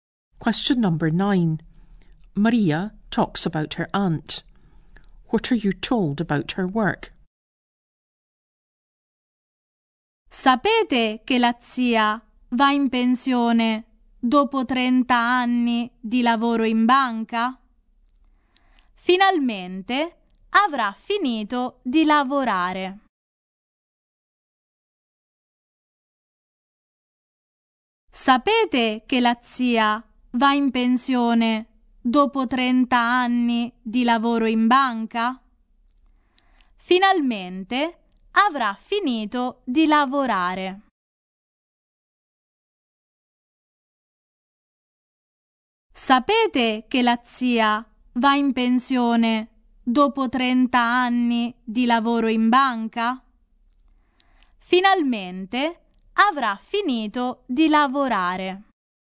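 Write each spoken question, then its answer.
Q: What are you told about her work?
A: She is retiring after 30 years of working in a bank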